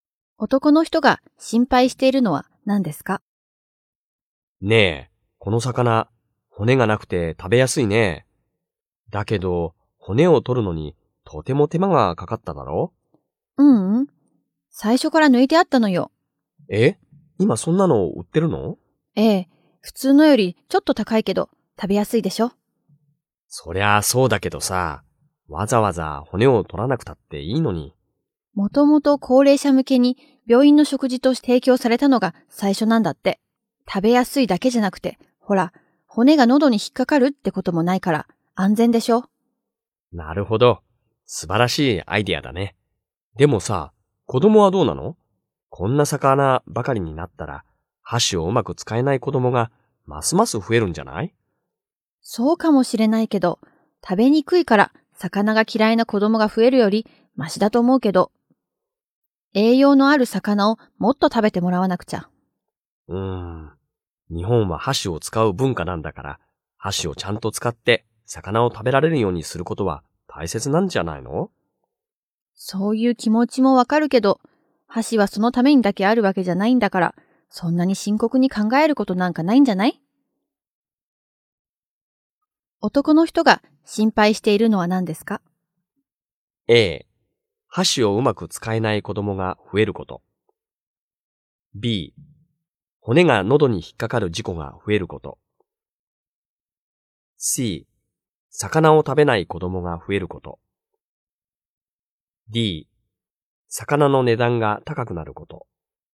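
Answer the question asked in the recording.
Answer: A: 箸をうまく使えない子供が増えること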